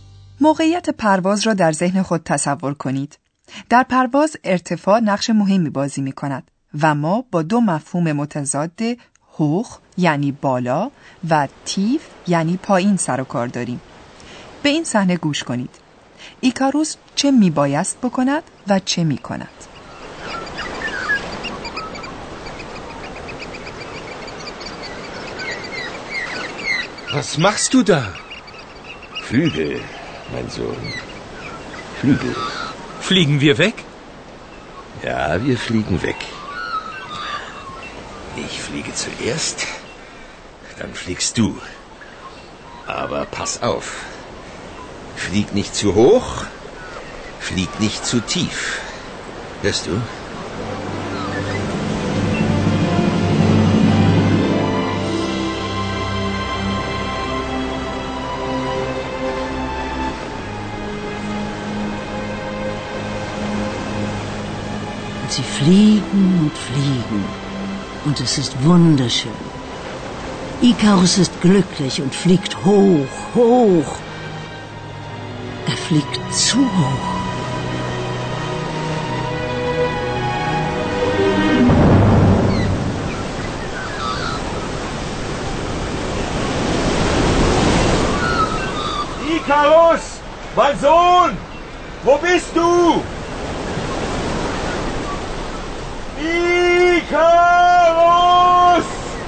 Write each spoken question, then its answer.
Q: ایکاروس چه می بایست بکند و چه کند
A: ایکاروس مراقب باش.